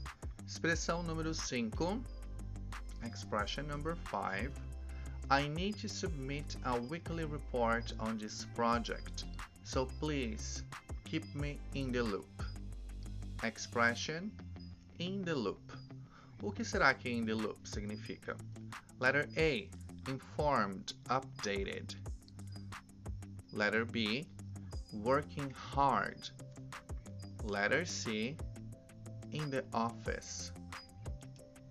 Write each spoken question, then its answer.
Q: O que será que in the loop significa?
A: Answer, letter A, informed, updated.